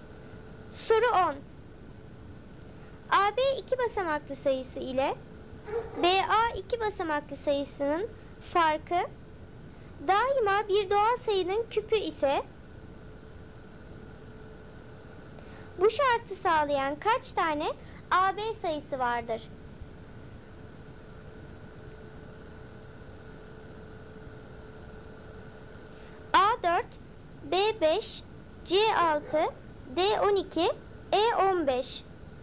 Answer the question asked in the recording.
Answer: Doğru cevap E15.